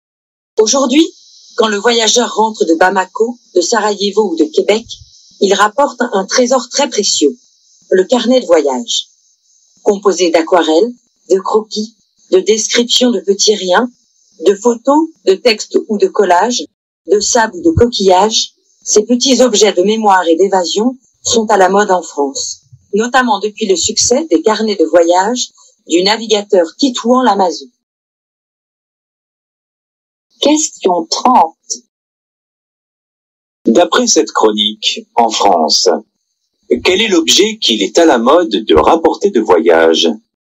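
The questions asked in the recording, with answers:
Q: D'après cette chronique, en France, quel est l'objet qu'il est à la mode de rapporter de voyage ?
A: Le carnet de voyage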